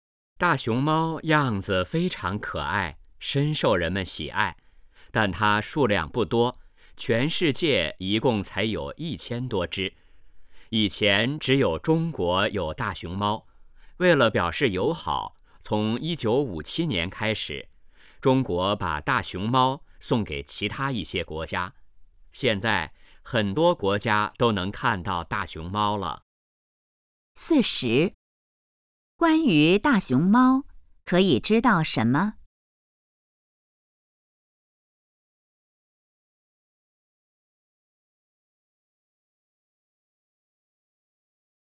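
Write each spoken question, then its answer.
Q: 中国为什么要送大熊猫出国?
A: 为了表示友好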